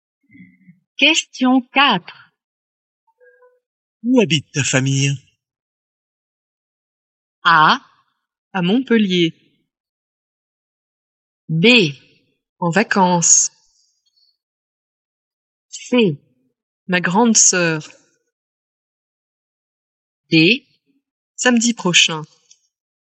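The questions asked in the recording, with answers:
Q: Où habite ta famille?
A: A: À Montpellier.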